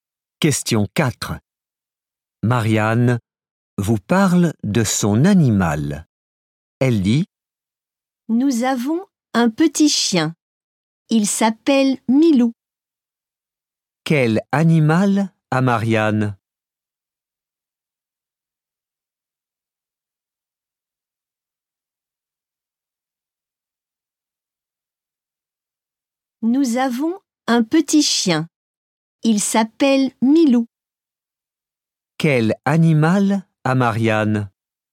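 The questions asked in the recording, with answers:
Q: Quel animal a Marianne ?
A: Un petit chien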